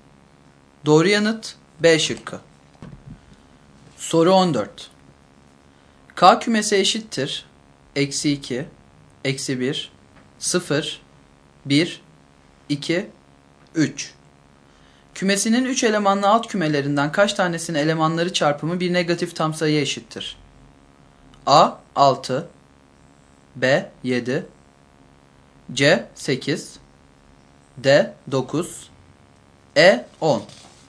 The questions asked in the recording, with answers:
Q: Kümesinin 3 elemanlı alt kümelerinden kaç tanesinin elemanları çarpımı bir negatif tam sayıya eşittir?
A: Doğru yanıt A şıkkı.